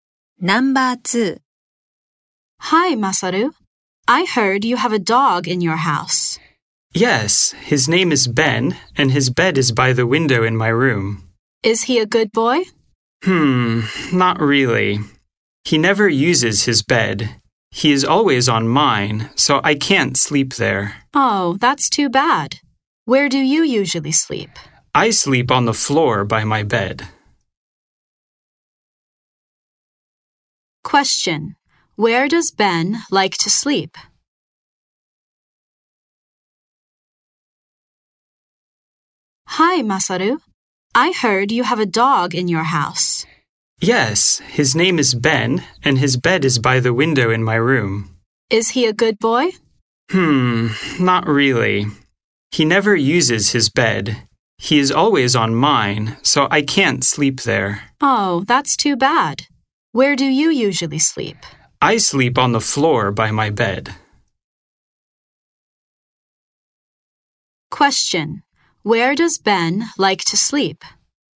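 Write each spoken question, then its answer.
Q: Where does Ben like to sleep?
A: On Masaru's bed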